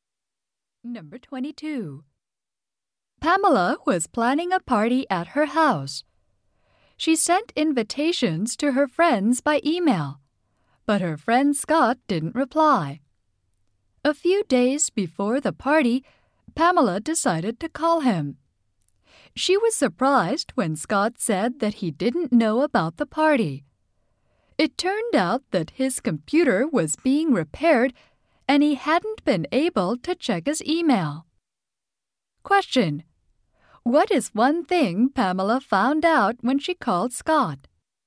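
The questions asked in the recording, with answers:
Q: What is one thing Pamela found out when she called Scott?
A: His computer was being repaired, so he hadn't seen the invitation.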